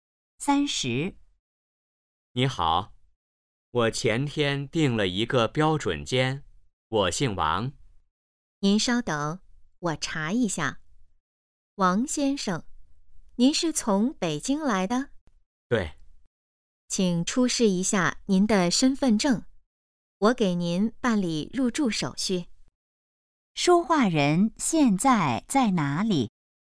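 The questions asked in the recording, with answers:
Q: 说话人现在在哪里?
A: 宾馆(酒店)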